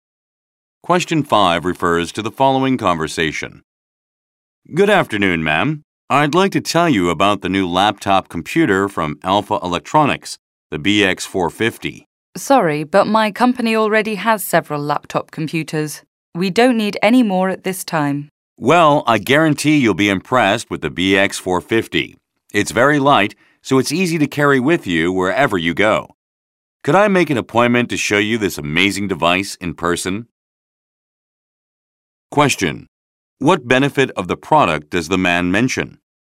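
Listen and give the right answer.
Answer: It is light and easy to carry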